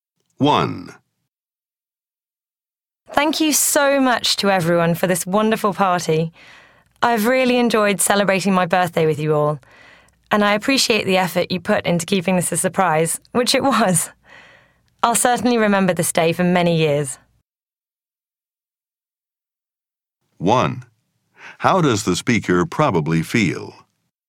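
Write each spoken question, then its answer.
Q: How does the speaker probably feel?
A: Grateful and happy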